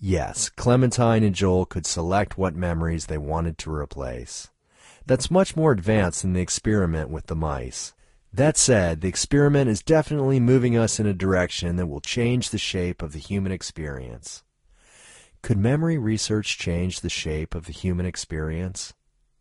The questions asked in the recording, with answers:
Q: Could memory research change the shape of the human experience?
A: Yes, memory research could change the shape of the human experience.